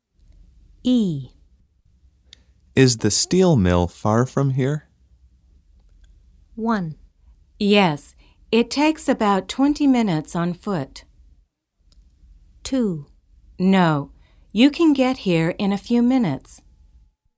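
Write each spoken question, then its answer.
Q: Is the steel mill far from here?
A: 1: Yes, it takes about 20 minutes on foot.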